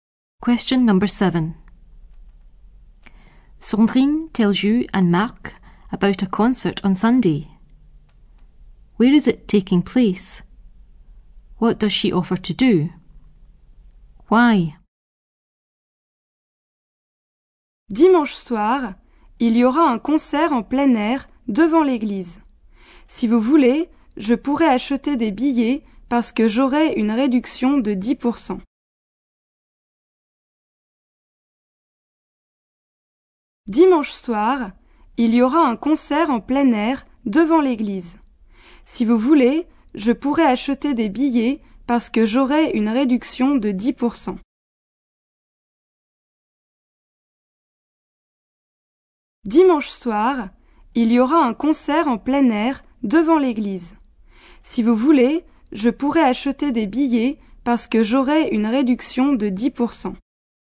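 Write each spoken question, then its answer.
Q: Where is it taking place?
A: Outdoors in front of the church

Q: What does she offer to do?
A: Buy the tickets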